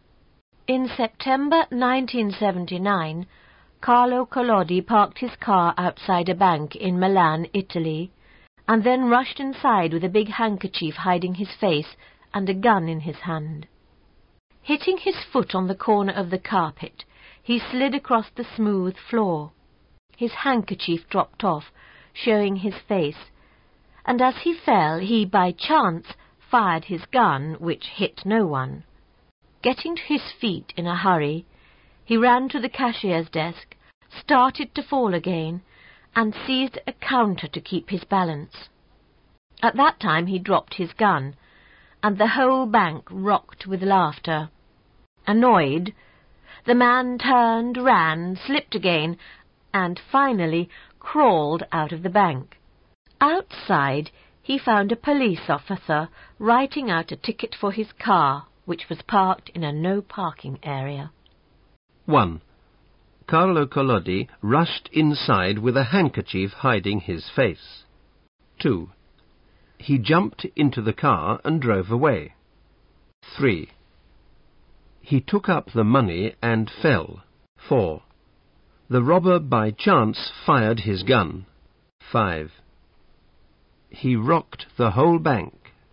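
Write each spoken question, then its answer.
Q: Carlo Collodi rushed inside with a handkerchief hiding his face.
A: Mentioned

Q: He jumped into the car and drove away.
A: Not mentioned

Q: He took up the money and fell.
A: Not mentioned

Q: The robber by chance fired his gun.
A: Mentioned

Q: He rocked the whole bank.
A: Not mentioned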